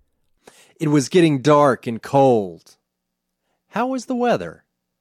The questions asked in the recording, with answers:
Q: How was the weather?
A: It was dark and cold.